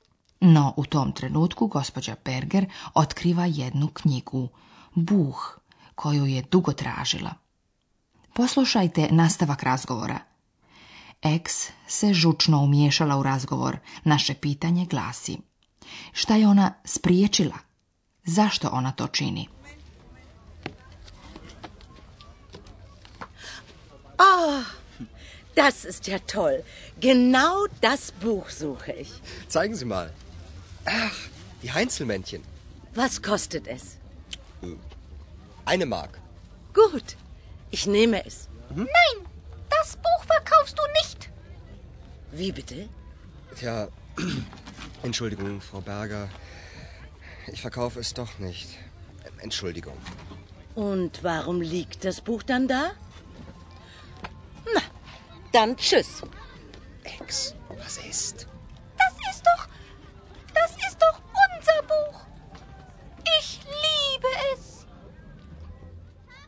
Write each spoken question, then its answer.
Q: Šta je ona spriječila?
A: Ex je spriječila da Andreas proda knjigu o čovječuljcima.